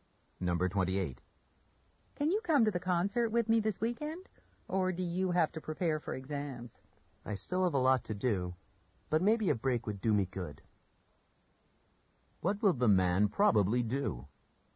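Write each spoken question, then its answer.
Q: What will the man probably do?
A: Go to the concert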